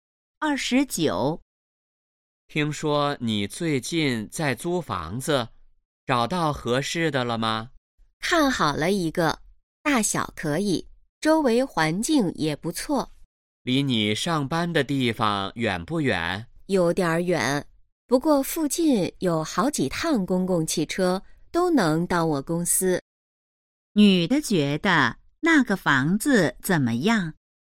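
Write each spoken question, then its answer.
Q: 女的觉得那个房子怎么样?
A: 还不错,但离公司有点远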